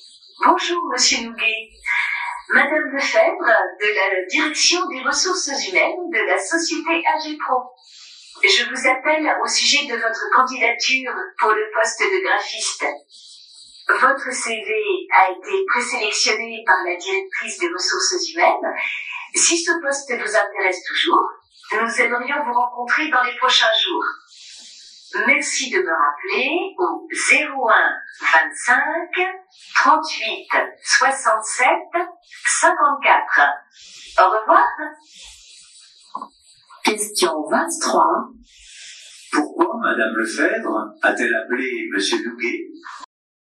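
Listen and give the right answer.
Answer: Pour lui proposer un entretien pour le poste de graphiste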